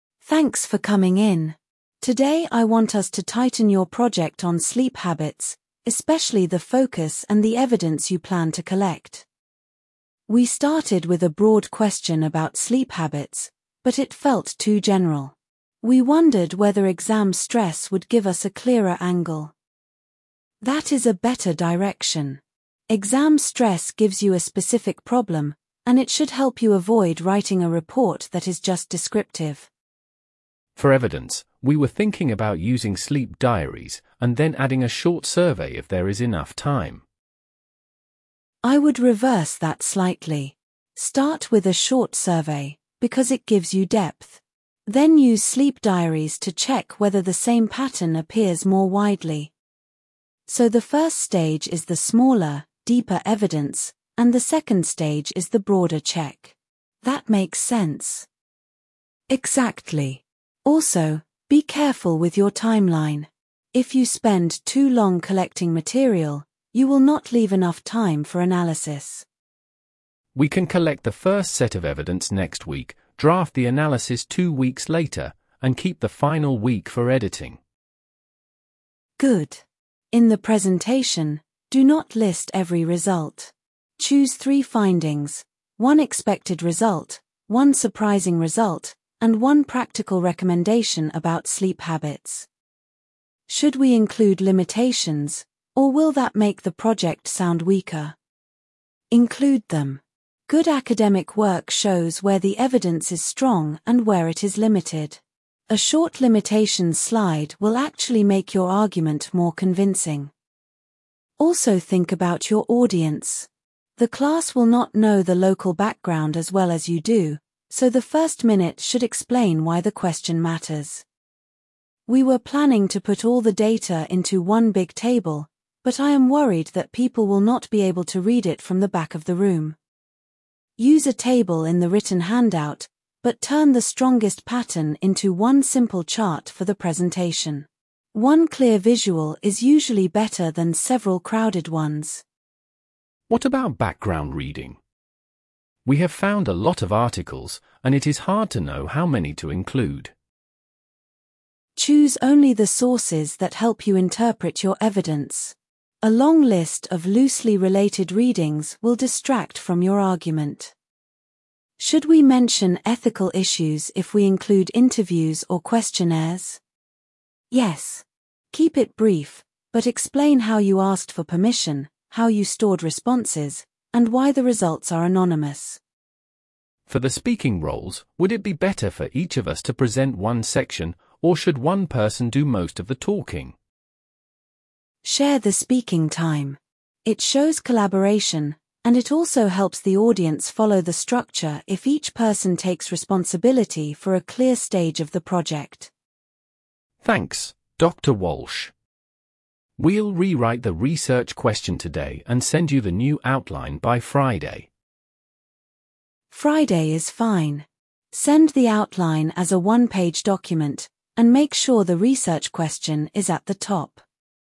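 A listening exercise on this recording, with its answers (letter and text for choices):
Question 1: What is the main purpose of the meeting?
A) To choose a textbook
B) To refine a project on sleep habits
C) To complain about grades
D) To book a field trip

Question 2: What focus do the students suggest?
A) Exam stress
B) A historical timeline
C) A funding application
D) A grammar exercise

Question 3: Which method does the tutor recommend starting with?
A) Sleep diaries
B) A short survey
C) A newspaper search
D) A laboratory test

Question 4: Why should the students manage their timeline carefully?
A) To avoid booking fees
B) To leave enough time for analysis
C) To finish the reading list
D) To arrange travel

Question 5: How many findings should the students choose for the presentation?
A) Two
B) Three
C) Four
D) Five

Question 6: What does the tutor say about limitations?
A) Leave them out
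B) Mention them briefly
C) Put them in the appendix only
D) Use them as the title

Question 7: When will the students send the new outline?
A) Today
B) By Friday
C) Next month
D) After the exam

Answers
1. B) To refine a project on sleep habits
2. A) Exam stress
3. B) A short survey
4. B) To leave enough time for analysis
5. B) Three
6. B) Mention them briefly
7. B) By Friday

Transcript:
Tutor: Thanks for coming in. Today I want us to tighten your project on sleep habits, especially the focus and the evidence you plan to collect.
Student A: We started with a broad question about sleep habits, but it felt too general. We wondered whether exam stress would give us a clearer angle.
Tutor: That is a better direction. Exam stress gives you a specific problem, and it should help you avoid writing a report that is just descriptive.
Student B: For evidence, we were thinking about using sleep diaries, and then adding a short survey if there is enough time.
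Tutor: I would reverse that slightly. Start with a short survey, because it gives you depth. Then use sleep diaries to check whether the same pattern appears more widely.
Student A: So the first stage is the smaller, deeper evidence, and the second stage is the broader check. That makes sense.
Tutor: Exactly. Also, be careful with your timeline. If you spend too long collecting material, you will not leave enough time for analysis.
Student B: We can collect the first set of evidence next week, draft the analysis two weeks later, and keep the final week for editing.
Tutor: Good. In the presentation, do not list every result. Choose three findings: one expected result, one surprising result, and one practical recommendation about sleep habits.
Student A: Should we include limitations, or will that make the project sound weaker?
Tutor: Include them. Good academic work shows where the evidence is strong and where it is limited. 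A short limitations slide will actually make your argument more convincing.
Tutor: Also think about your audience. The class will not know the local background as well as you do, so the first minute should explain why the question matters.
Student A: We were planning to put all the data into one big table, but I am worried that people will not be able to read it from the back of the room.
Tutor: Use a table in the written handout, but turn the strongest pattern into one simple chart for the presentation. One clear visual is usually better than several crowded ones.
Student B: What about background reading? We have found a lot of articles, and it is hard to know how many to include.
Tutor: Choose only the sources that help you interpret your evidence. A long list of loosely related readings will distract from your argument.
Student A: Should we mention ethical issues if we include interviews or questionnaires?
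Tutor: Yes. Keep it brief, but explain how you asked for permission, how you stored responses, and why the results are anonymous.
Student B: For the speaking roles, would it be better for each of us to present one section, or should one person do most of the talking?
Tutor: Share the speaking time. It shows collaboration, and it also helps the audience follow the structure if each person takes responsibility for a clear stage of the project.
Student B: Thanks, Dr Walsh. We'll rewrite the research question today and send you the new outline by Friday.
Tutor: Friday is fine. Send the outline as a one-page document, and make sure the research question is at the top.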